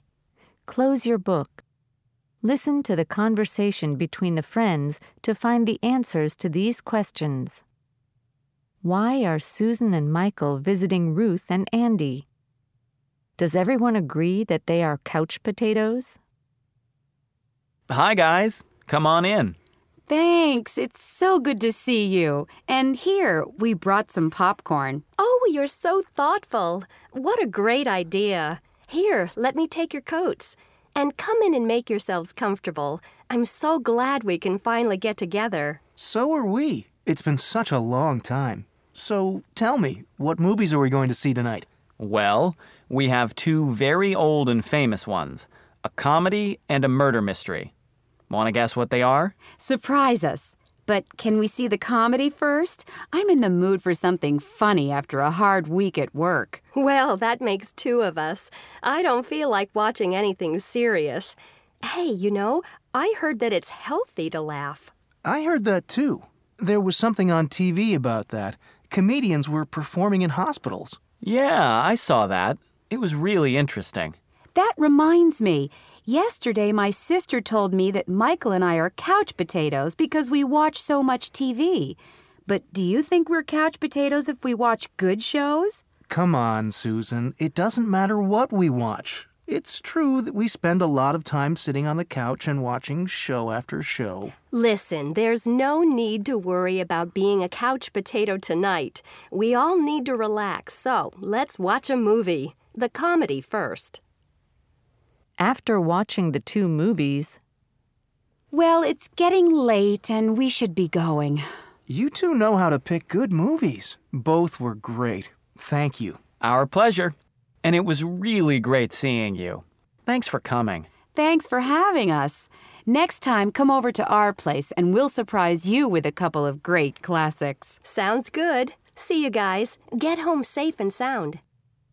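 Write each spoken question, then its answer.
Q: Why are Susan and Michael visiting Ruth and Andy?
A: To watch movies together (a comedy and a murder mystery)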